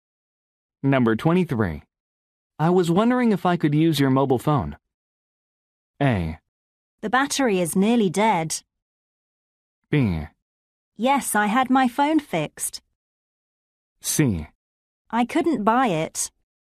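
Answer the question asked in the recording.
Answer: A: The battery is nearly dead.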